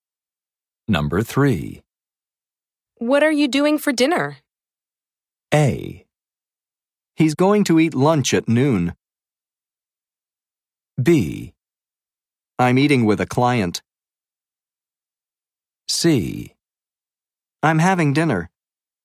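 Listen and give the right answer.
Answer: B: I'm eating with a client.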